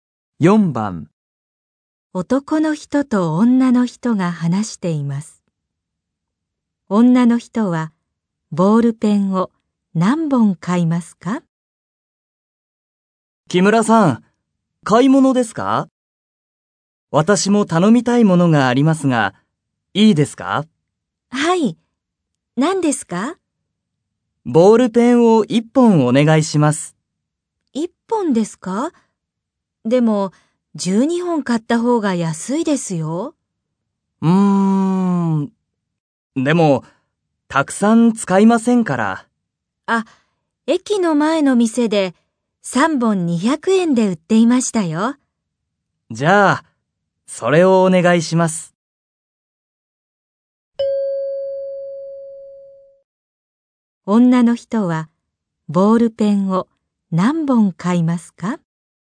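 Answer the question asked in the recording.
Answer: 3本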